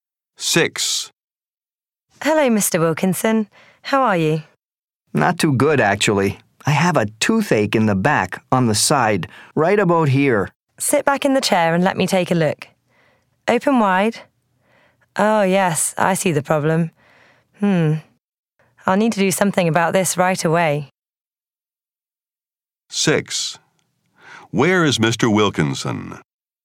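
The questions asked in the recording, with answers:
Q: Where is Mr. Wilkinson?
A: At the dentist's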